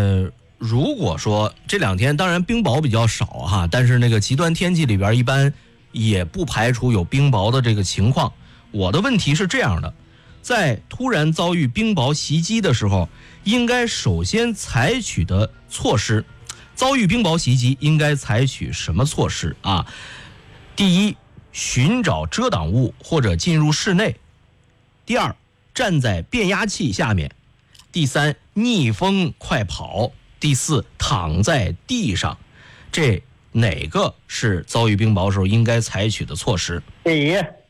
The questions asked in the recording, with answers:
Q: 遭遇冰雹袭击应该采取什么措施啊?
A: 寻找遮挡物或者进入室内,是吧?